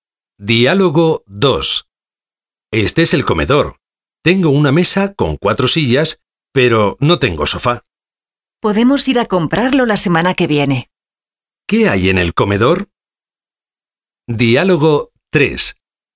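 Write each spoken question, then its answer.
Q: ¿Qué hay en el comedor?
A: Una mesa con 4 sillas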